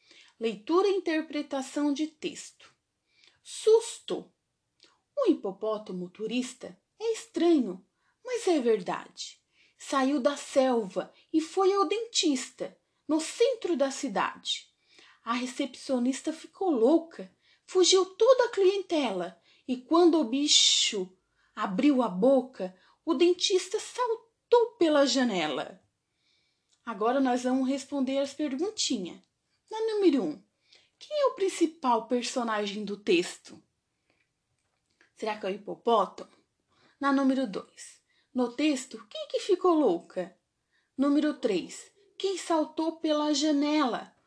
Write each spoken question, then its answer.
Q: quem saltou pela janela?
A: Foi o dentista, será?